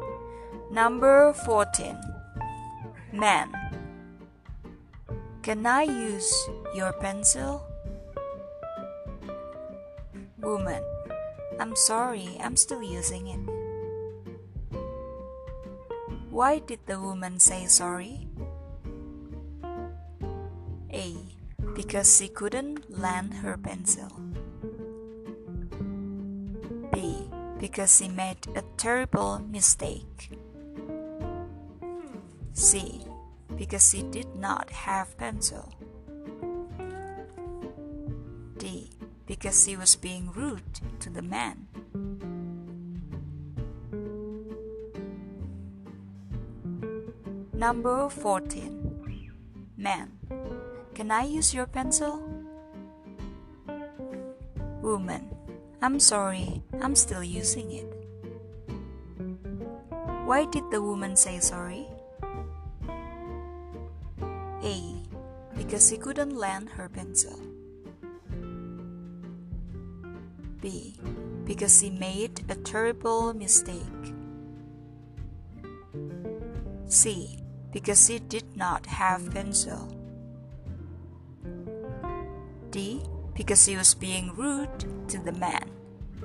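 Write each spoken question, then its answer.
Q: Why did the woman say sorry?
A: A: Because she couldn't lend her pencil.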